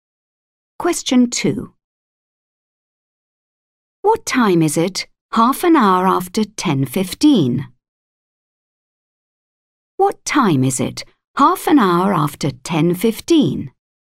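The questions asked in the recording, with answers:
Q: What time is it 1/2 hour after 10:15?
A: 10:45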